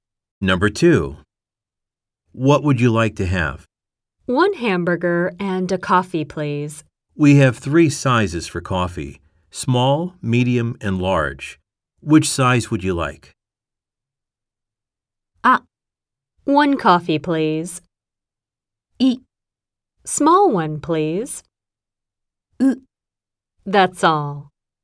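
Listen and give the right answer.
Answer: イ: Small one, please.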